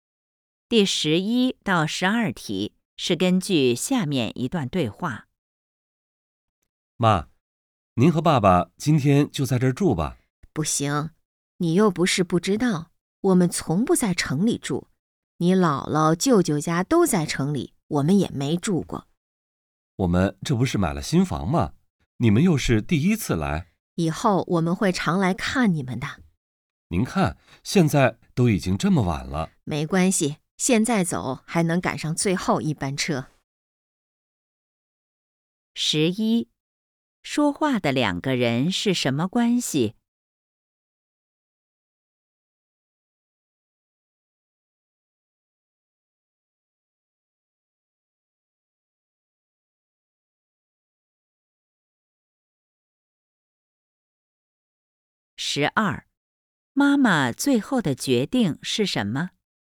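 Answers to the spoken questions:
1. 母亲和孩子
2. 不住下,赶最后一班车回家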